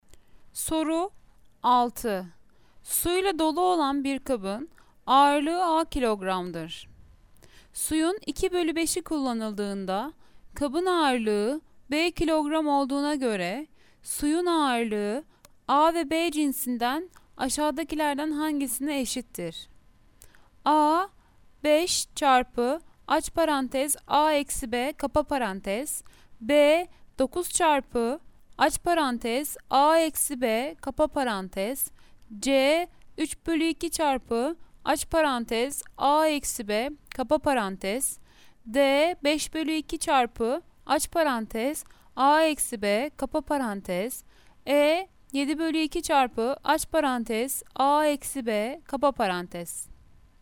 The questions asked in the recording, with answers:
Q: Suyun 2 bölü 5'i kullanıldığında kabın ağırlığı B kilogram olduğuna göre suyun ağırlığı A ve B cinsinden aşağıdakilerden hangisine eşittir?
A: Cevap Denizli 5 bölü 2 çarpı aç parantez A eksi B kapa parantez.